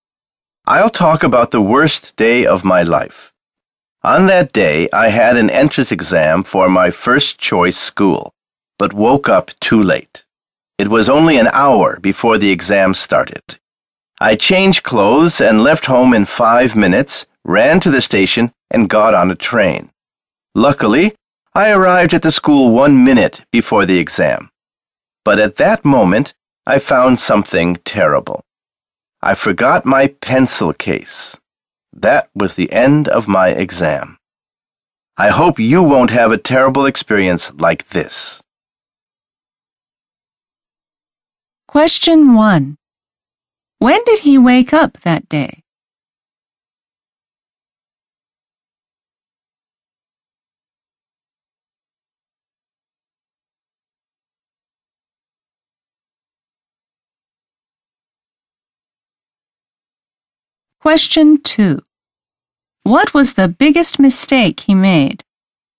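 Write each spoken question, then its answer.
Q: When did he wake up that day?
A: Only an hour before the exam started

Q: What was the biggest mistake he made?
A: He forgot his pencil case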